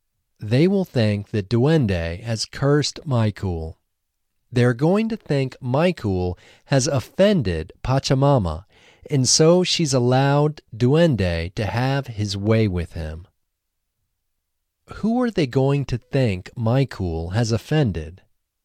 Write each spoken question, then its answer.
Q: Who are they going to think Michael has offended?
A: They're going to think Michael has offended Pachamama.